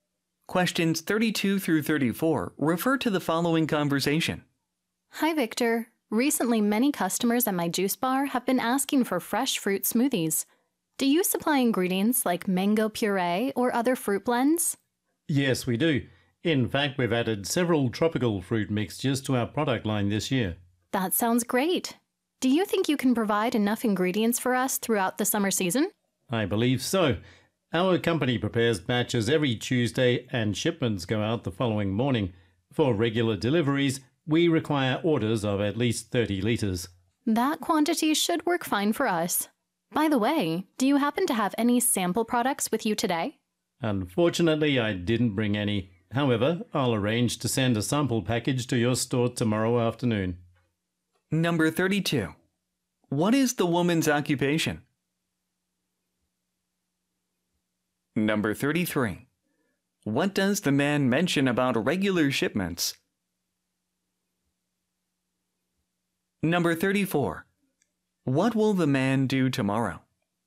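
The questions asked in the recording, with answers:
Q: What is the woman's occupation?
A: She owns or runs a juice bar

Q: What does the man mention about regular shipments?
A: Orders must be at least 30 liters

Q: What will the man do tomorrow?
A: Send a sample package to her store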